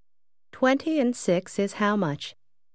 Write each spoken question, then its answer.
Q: 20 and 6 is how much?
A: 26.